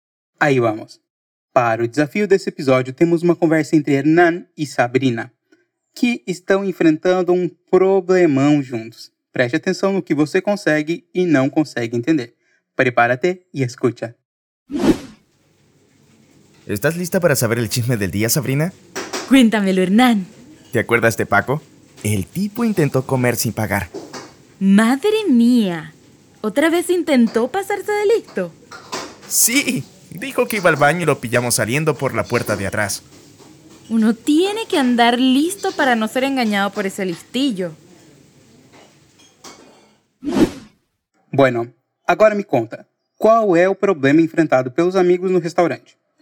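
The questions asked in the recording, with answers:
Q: Bueno, ahora me conta, ¿Cuál es el problema enfrentado los amigos el restaurante?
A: Paco, un cliente, intentó comer sin pagar: dijo que iba al baño y lo pillaron saliendo por la puerta de atrás.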